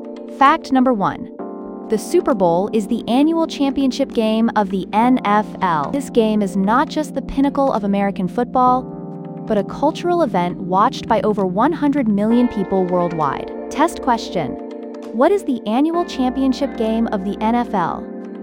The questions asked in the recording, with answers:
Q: What is the annual championship game of the NFL?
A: the Super Bowl.